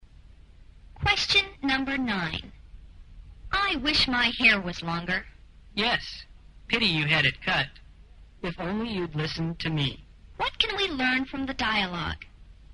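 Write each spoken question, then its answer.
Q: What can we learn from the dialogue?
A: She regrets having her hair cut; the other person had advised her not to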